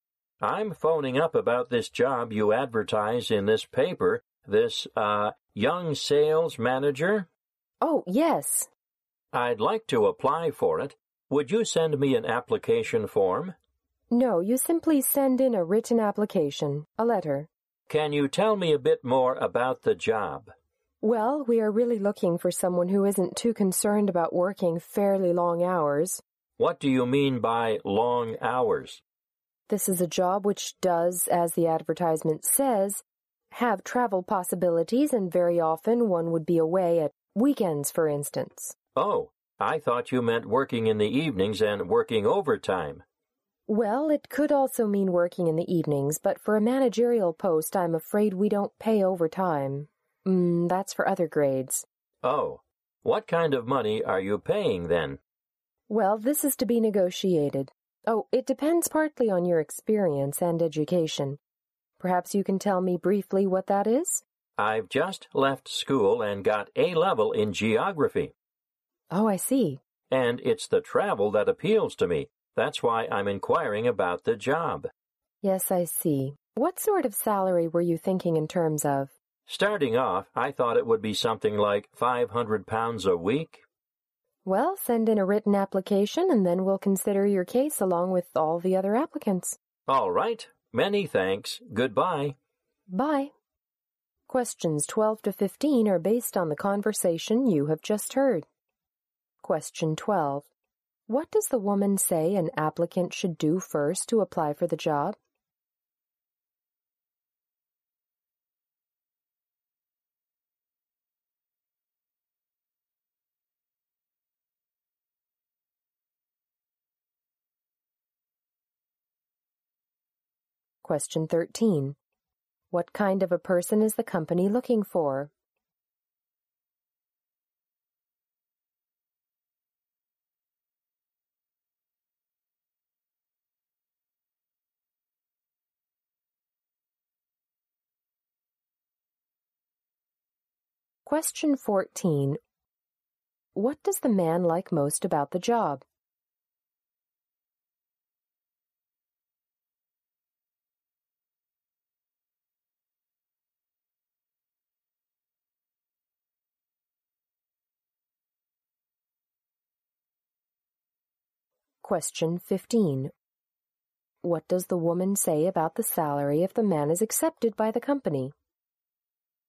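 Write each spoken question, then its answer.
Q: What does the woman say an applicant should do first to apply for the job?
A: Send in a written application letter

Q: What kind of a person is the company looking for?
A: Someone willing to work fairly long hours

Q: What does the man like most about the job?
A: The travel

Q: What does the woman say about the salary if the man is accepted by the company?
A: It is to be negotiated, depending on experience and education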